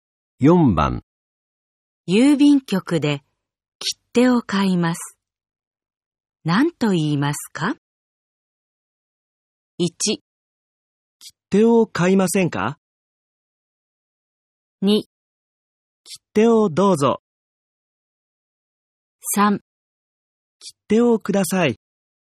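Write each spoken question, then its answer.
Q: 郵便局で切手を買います。何と言いますか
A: 3: 切手をください。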